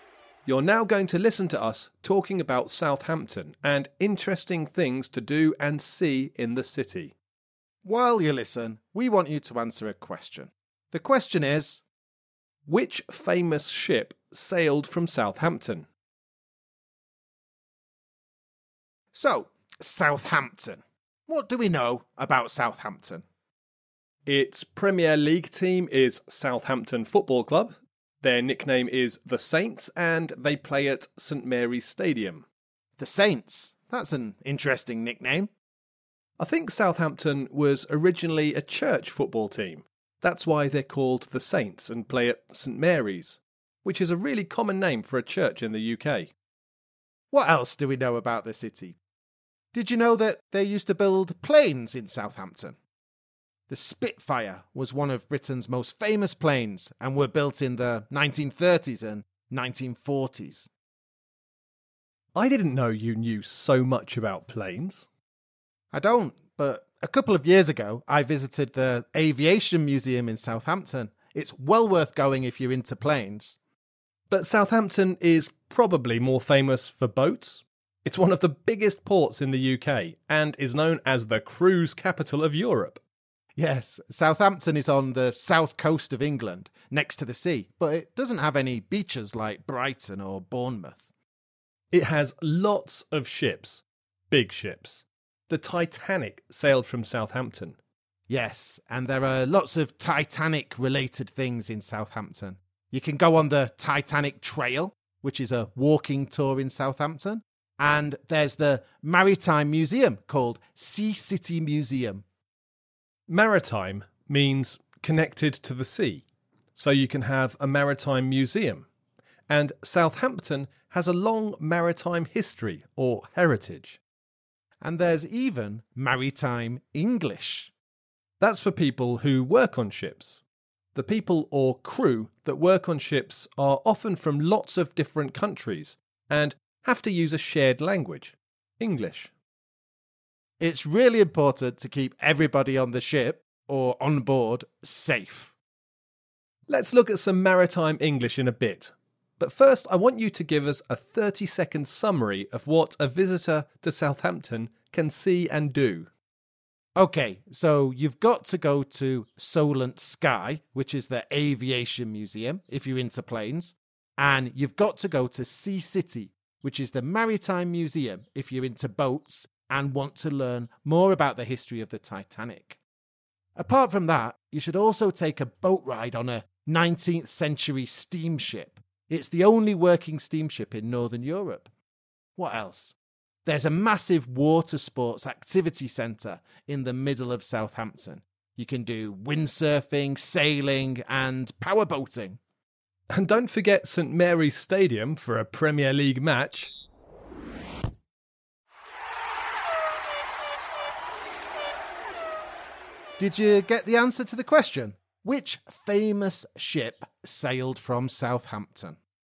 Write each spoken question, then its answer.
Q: which famous ship sailed from Southampton?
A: The answer, of course, is the Titanic.